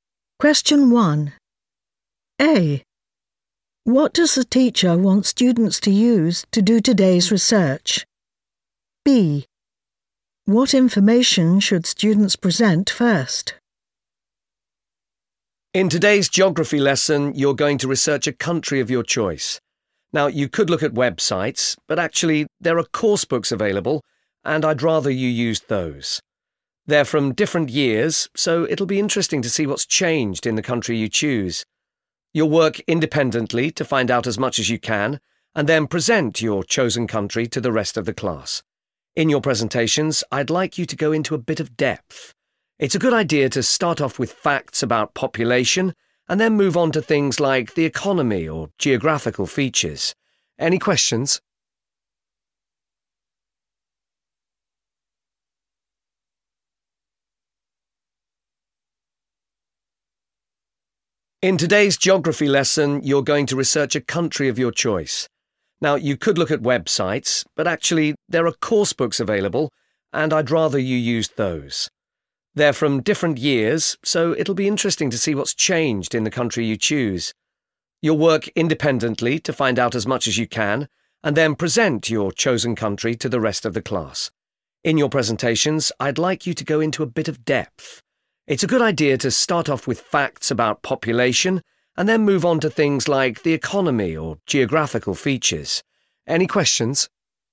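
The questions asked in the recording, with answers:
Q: What does the teacher want students to use to do today's research?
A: course books

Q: What information should students present first?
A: facts about population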